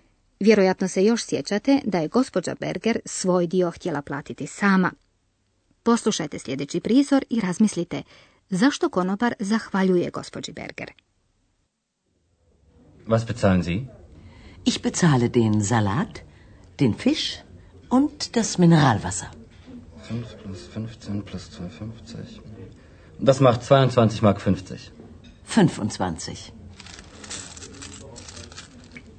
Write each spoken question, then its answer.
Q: Poslušajte sljedeći prizor i razmislite zašto konobar zahvaljuje gospođi Berger.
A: Konobar zahvaljuje za napojnicu koju mu je dala gospođa Berger